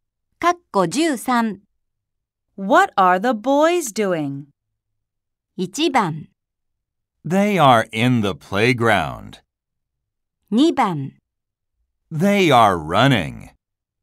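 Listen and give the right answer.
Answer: 2: They are running.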